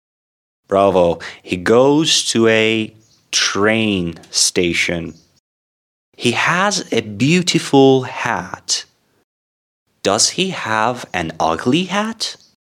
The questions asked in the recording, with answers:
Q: Does he have an ugly hat?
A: No. Mr. Jones' hat is very beautiful.